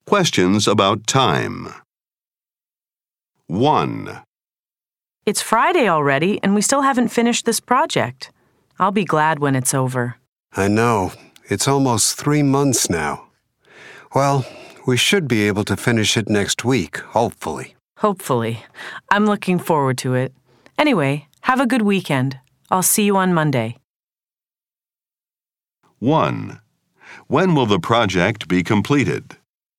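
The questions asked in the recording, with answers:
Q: When will the project be completed?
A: Next week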